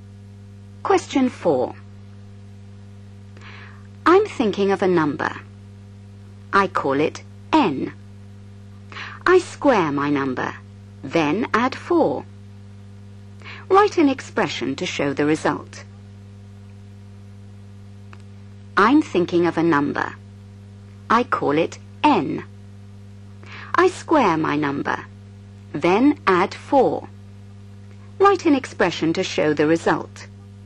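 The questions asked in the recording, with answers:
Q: Write an expression to show the result.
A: n2 + 4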